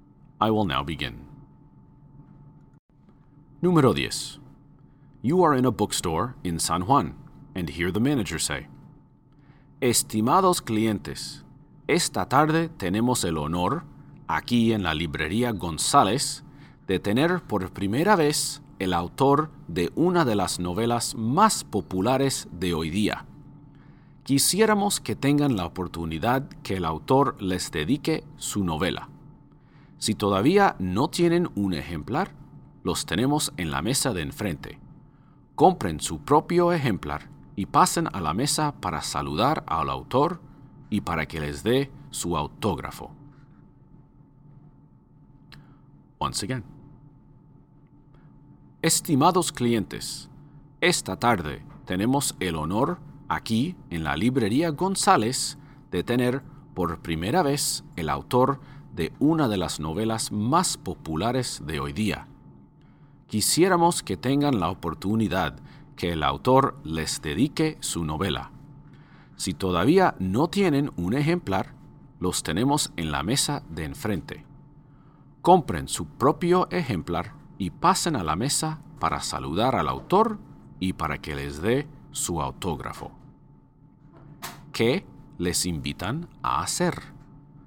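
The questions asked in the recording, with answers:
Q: ¿Qué les invitan a hacer?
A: Comprar la novela y conseguir el autógrafo del autor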